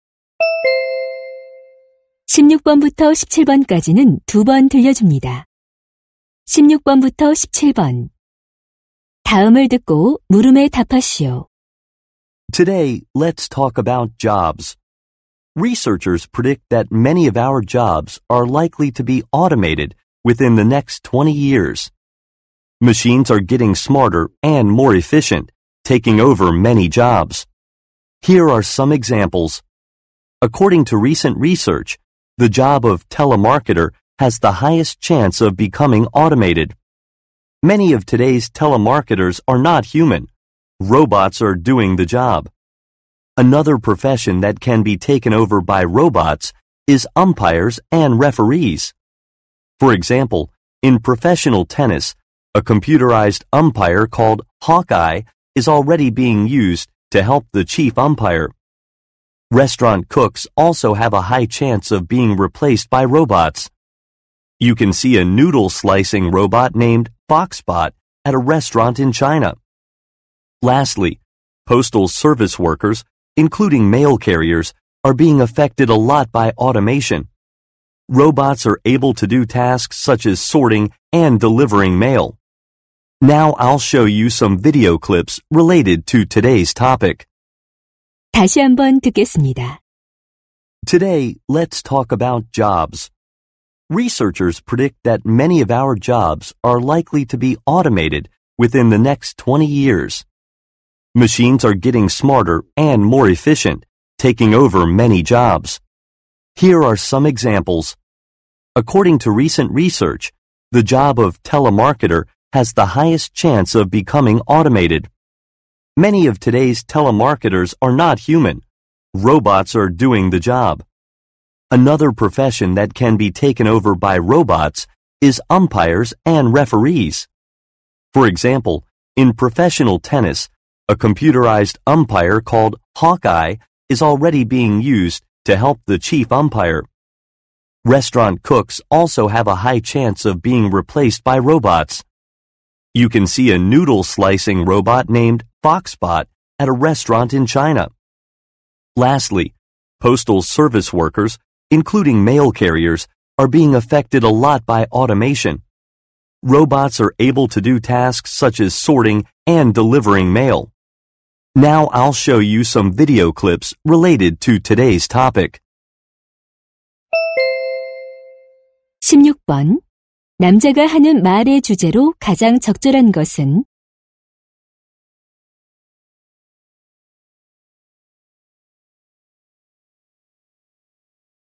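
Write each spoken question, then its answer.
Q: 남자가 하는 말의 주제로 가장 적절한 것은?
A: 자동화로 인해 로봇에게 대체될 가능성이 높은 직업들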